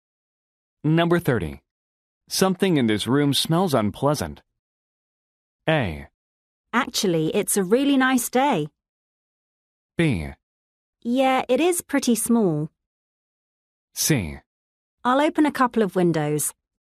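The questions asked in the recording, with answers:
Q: Something in this room smells unpleasant.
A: C: I'll open a couple of windows.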